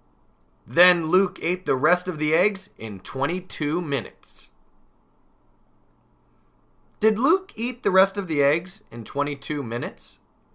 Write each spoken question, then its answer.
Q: Did Luke eat the rest of the eggs in 22 minutes?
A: Yes, he did. That's what he did.